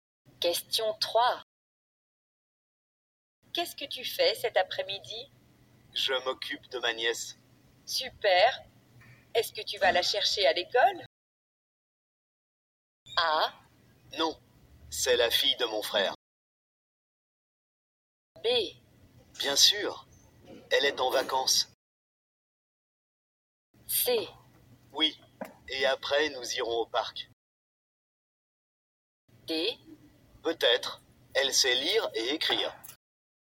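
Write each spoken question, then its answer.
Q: Super. Est-ce que tu vas la chercher à l'école?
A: C: Oui, et après nous irons au parc.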